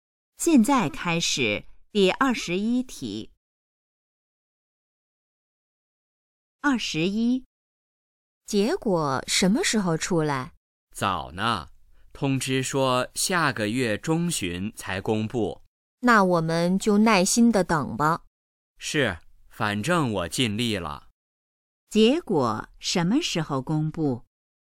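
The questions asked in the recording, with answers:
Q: 结果什么时候公布?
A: 下个月中旬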